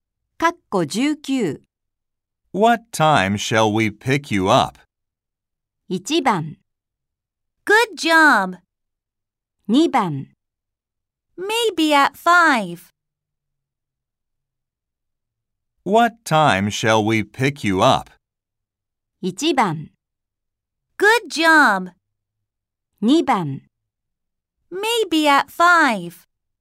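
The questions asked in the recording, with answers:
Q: What time shall we pick you up?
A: 2: Maybe at 5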